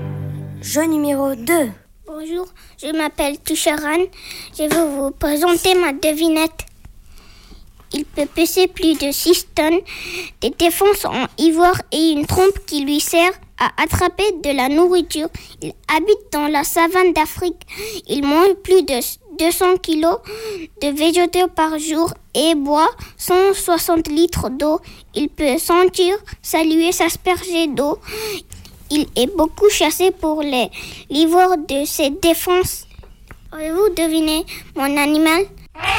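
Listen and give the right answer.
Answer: l'éléphant d'Afrique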